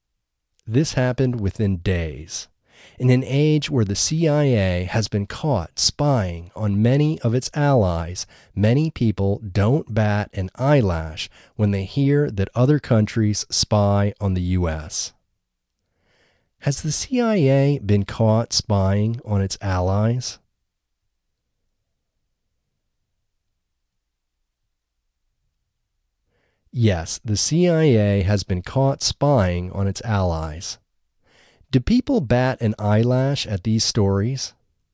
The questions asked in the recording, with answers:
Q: Do people bat an eyelash at these stories?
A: No, people don't bat an eyelash at these stories.